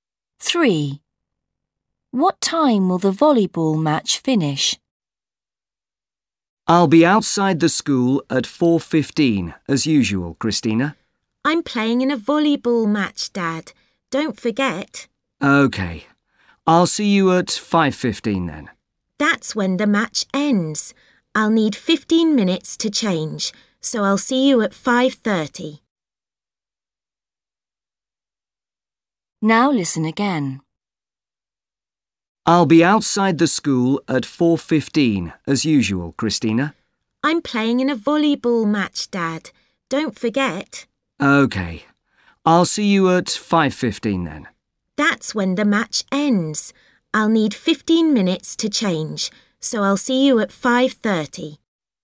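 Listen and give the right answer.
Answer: 5:15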